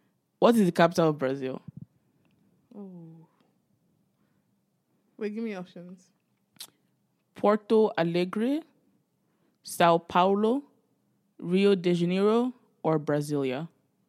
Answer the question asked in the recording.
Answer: No, it's Brasilia.